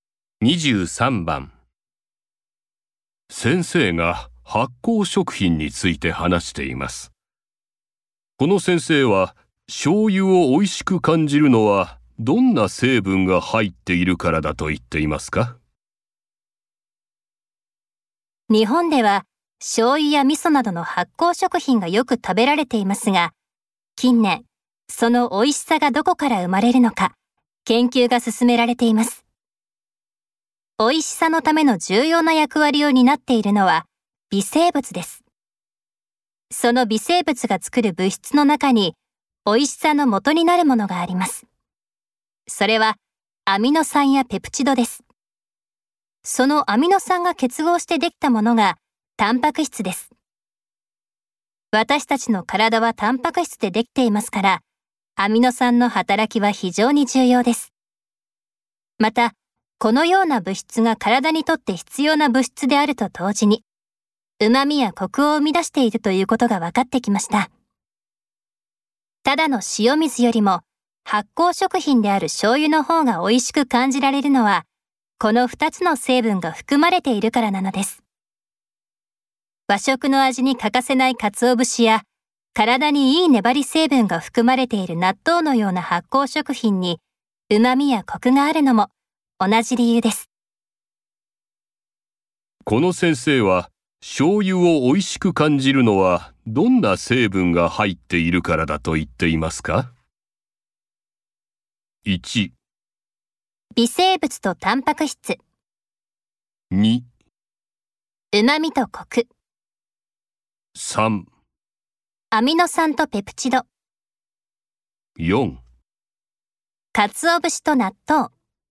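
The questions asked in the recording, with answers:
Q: この先生は醤油を美味しく感じるのはどんな成分が入っているからだと言っていますか?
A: 3: アミノ酸とペプチド。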